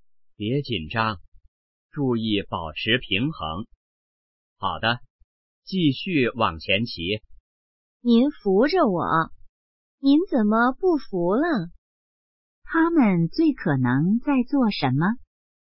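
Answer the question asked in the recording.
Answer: 学骑自行车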